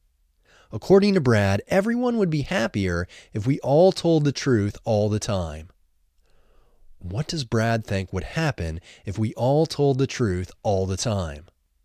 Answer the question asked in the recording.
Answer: Brad thinks everyone would be happier if we all told the truth all the time.